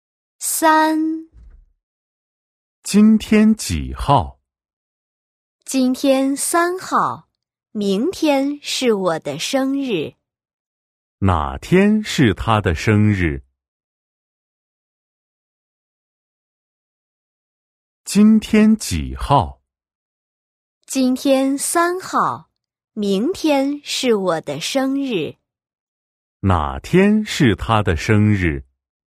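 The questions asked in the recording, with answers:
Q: 哪天是他的生日?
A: 四号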